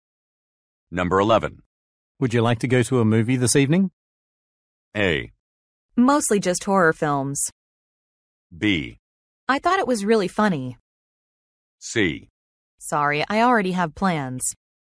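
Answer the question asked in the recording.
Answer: C: Sorry, I already have plans.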